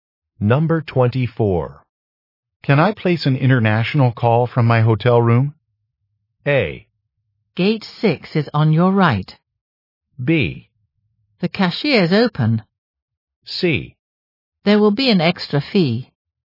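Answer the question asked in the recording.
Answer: C: There will be an extra fee.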